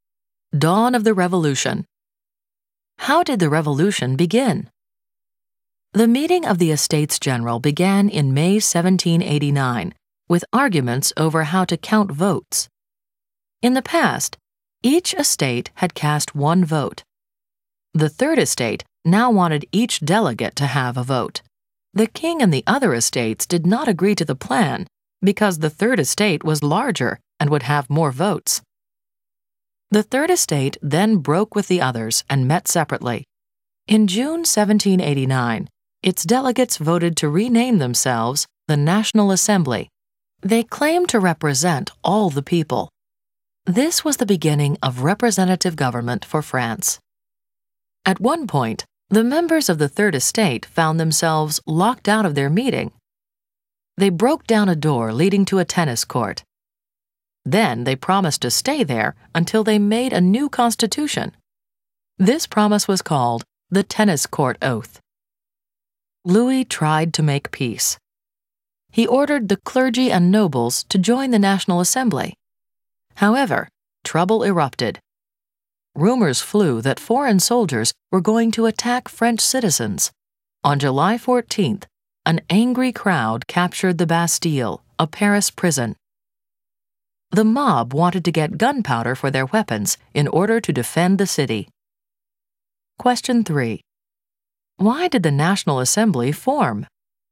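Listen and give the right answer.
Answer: The third estate wanted each delegate to get a vote; when the king and the other estates refused, it broke away and met on its own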